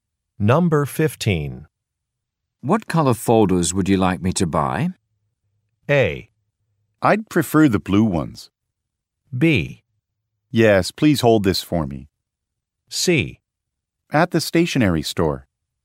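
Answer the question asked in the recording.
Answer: A: I'd prefer the blue ones.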